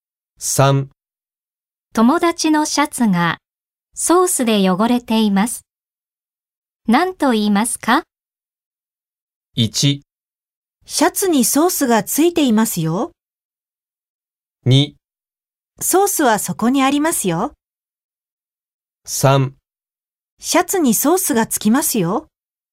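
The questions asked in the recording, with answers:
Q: 友達のシャツがソースで汚れています。何と言いますか?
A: 1: シャツにソースがついていますよ。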